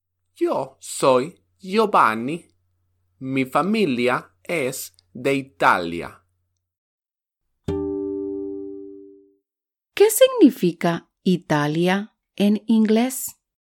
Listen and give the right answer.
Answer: Correcto. Italia significa Italy.